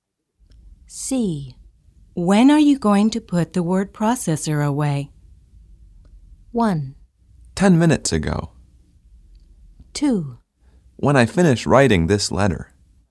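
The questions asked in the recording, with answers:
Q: When are you going to put the word processor away?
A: 2: When I finish writing this letter.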